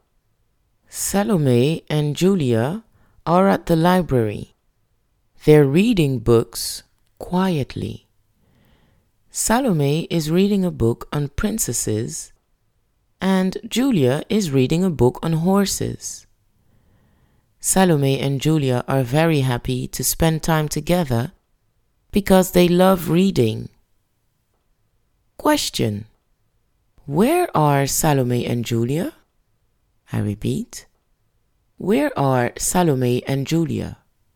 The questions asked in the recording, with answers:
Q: where are Salome and Julia?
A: Salome and Julia are at the library.